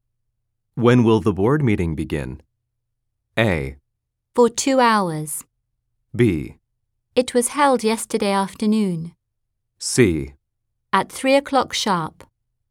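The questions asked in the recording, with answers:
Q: When will the board meeting begin?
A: C: At 3 o'clock sharp.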